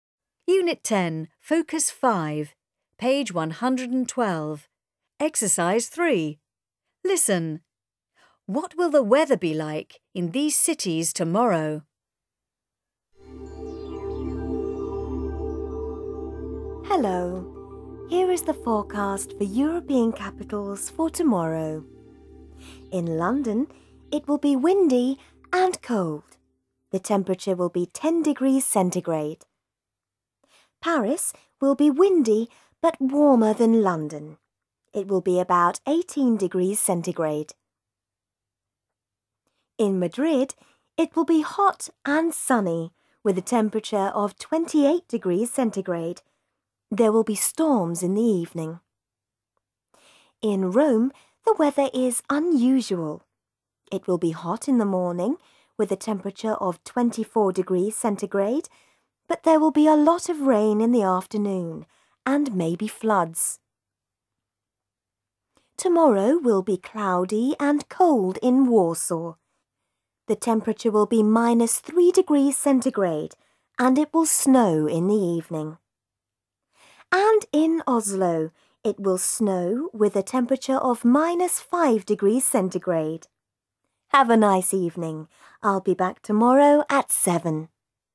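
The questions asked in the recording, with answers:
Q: What will the weather be like in these cities tomorrow?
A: London: windy and cold, 10°C; Paris: windy but warmer, about 18°C; Madrid: hot and sunny, 28°C, storms in the evening; Rome: hot in the morning, 24°C, then a lot of rain and maybe floods in the afternoon; Warsaw: cloudy and cold, -3°C, snow in the evening; Oslo: snow, -5°C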